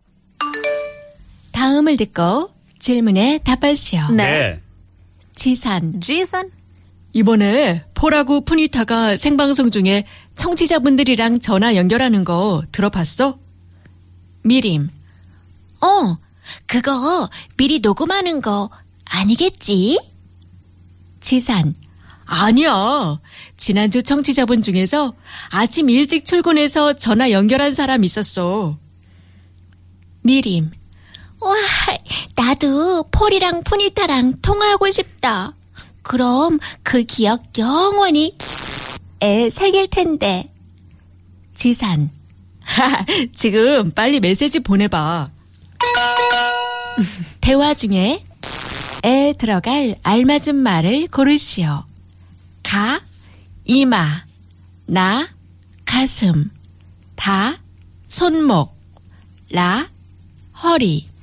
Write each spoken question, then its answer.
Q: 대화 중에 에 들어갈 알맞은 말을 고르시오.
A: 가슴에 품어.